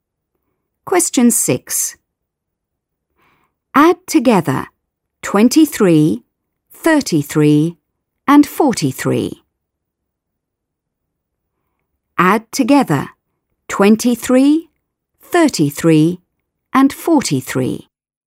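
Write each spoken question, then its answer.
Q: Add together 23, 33 and 43.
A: 99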